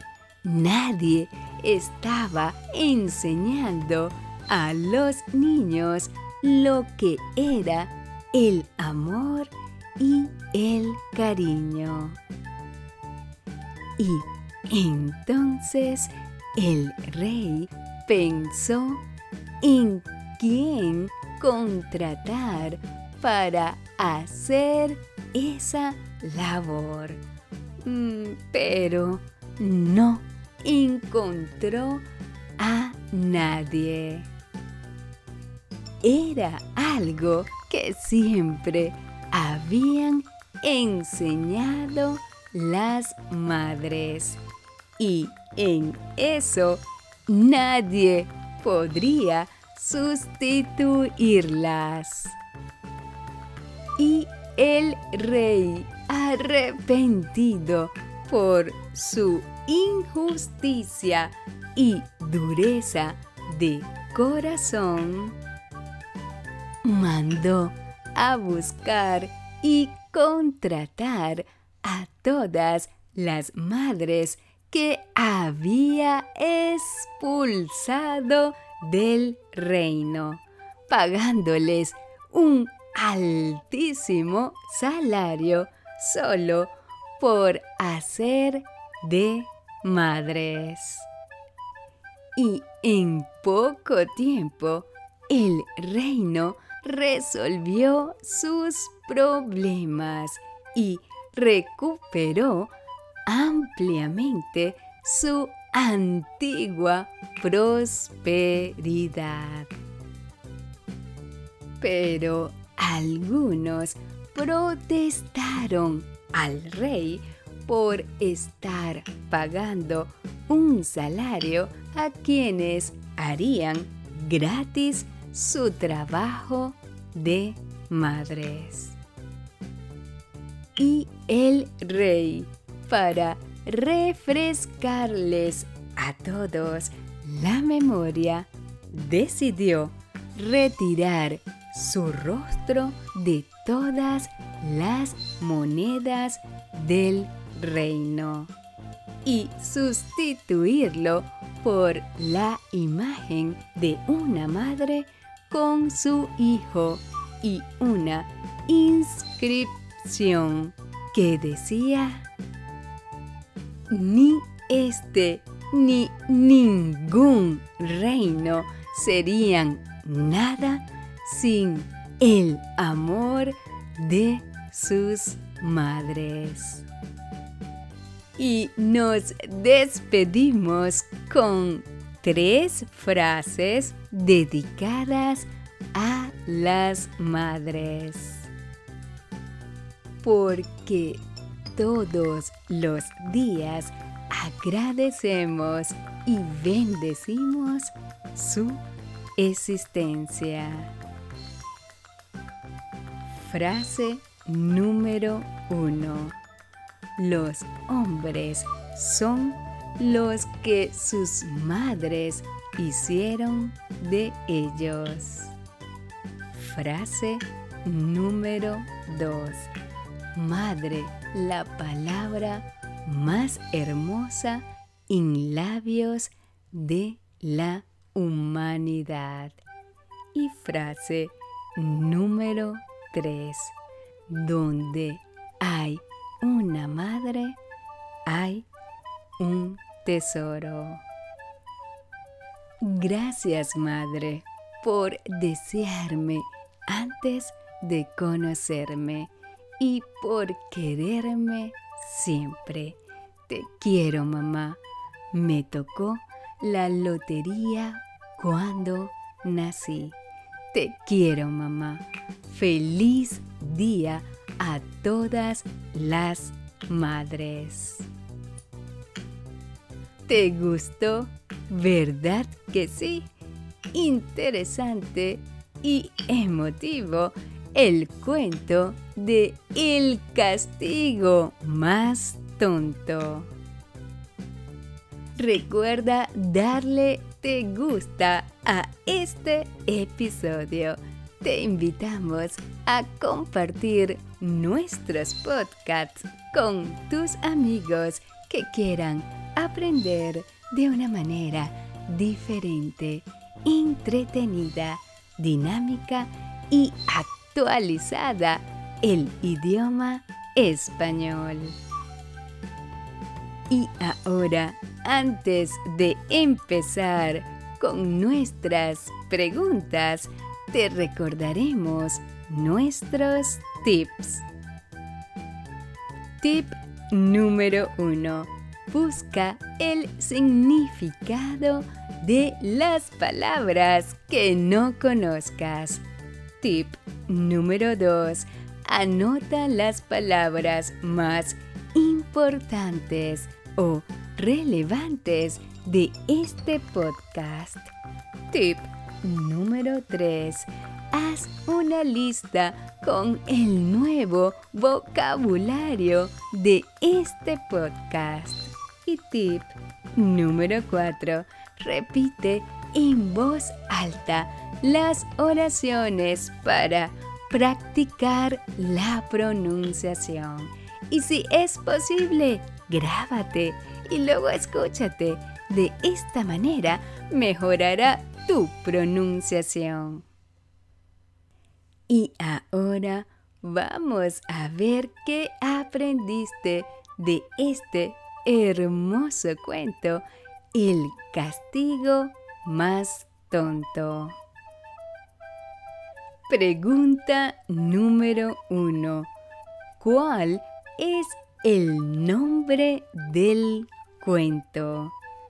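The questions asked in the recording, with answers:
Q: ¿Cuál es el nombre del cuento?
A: El castigo más tonto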